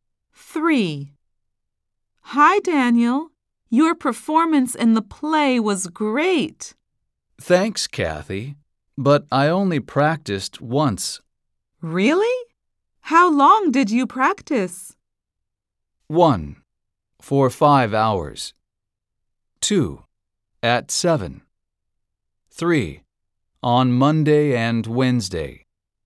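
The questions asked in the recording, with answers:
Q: Really? How long did you practice?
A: 1: For 5 hours.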